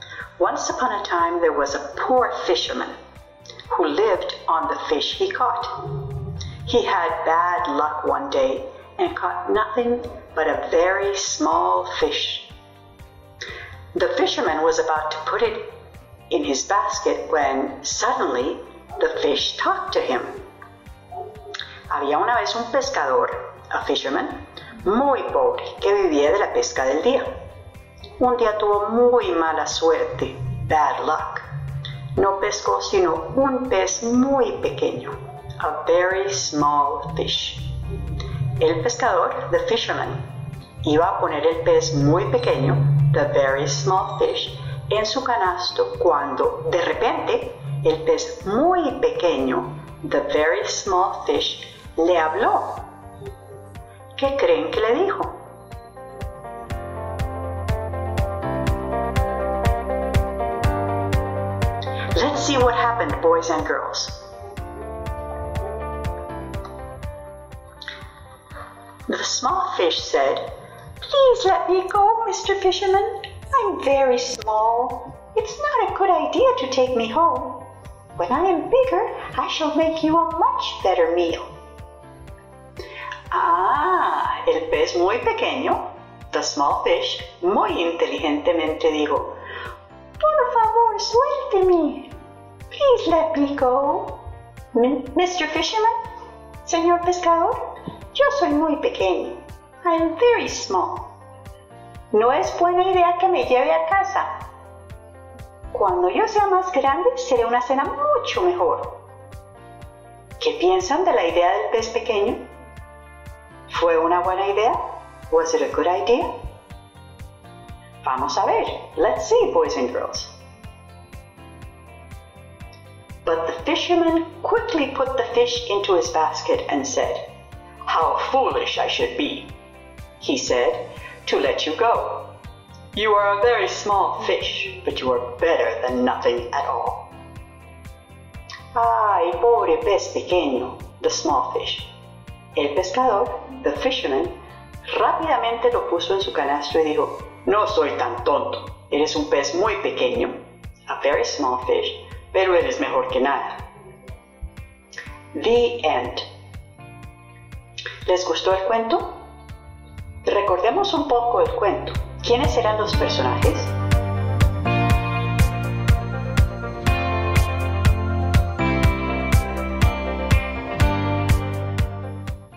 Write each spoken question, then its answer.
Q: ¿Quiénes eran los personajes?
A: The fisherman and the small fish.